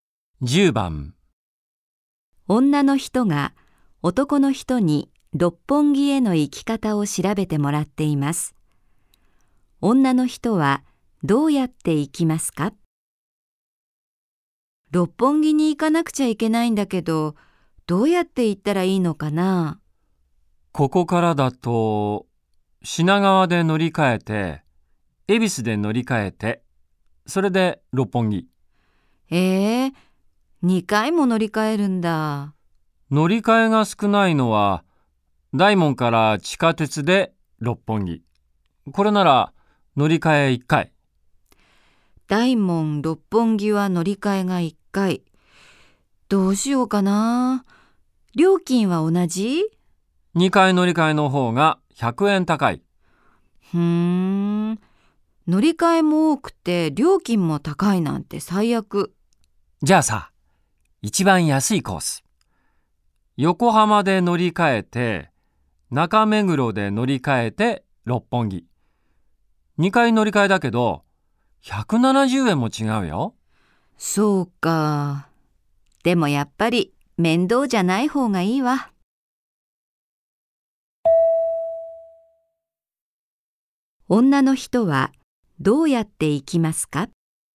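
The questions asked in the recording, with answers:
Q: 女の人はどうやって行きますか?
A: 大門で地下鉄に乗り換えて六本木へ行く(乗り換え1回)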